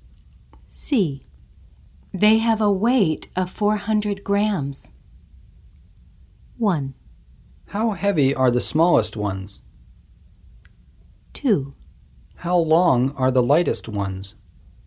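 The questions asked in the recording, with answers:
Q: They have a weight of 400 grams.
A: 1: How heavy are the smallest ones?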